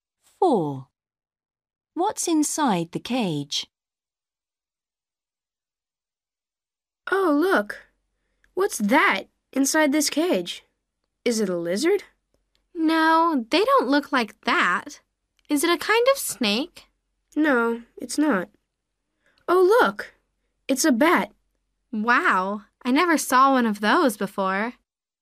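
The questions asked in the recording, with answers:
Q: What's inside the cage?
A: A bat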